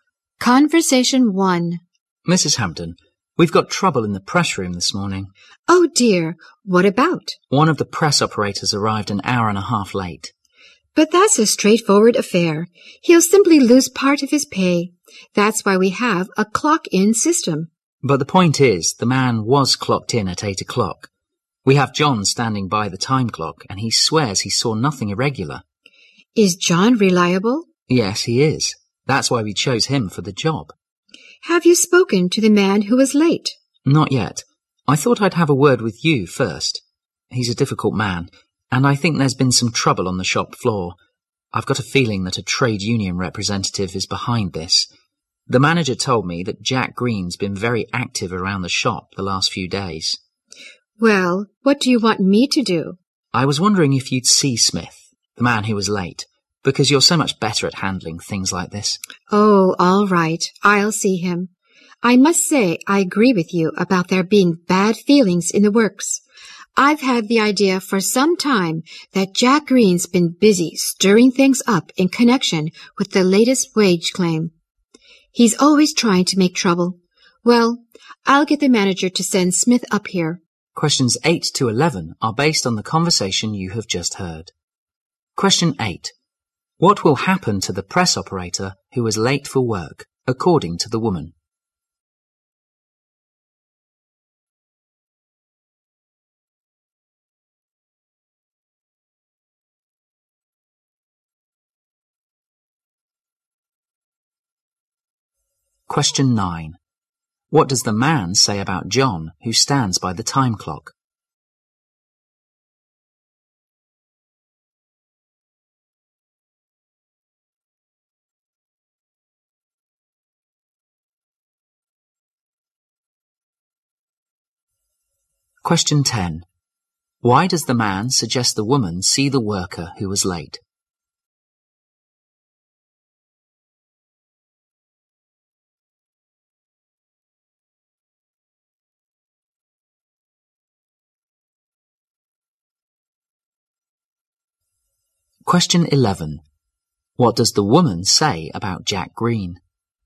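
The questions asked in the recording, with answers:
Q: What will happen to the press operator who was late for work, according to the woman?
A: He will lose part of his pay

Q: What does the man say about John, who stands by the time clock?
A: He is reliable

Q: Why does the man suggest the woman see the worker who was late?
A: She is better at handling such things

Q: What does the woman say about Jack Green?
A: He is always trying to make trouble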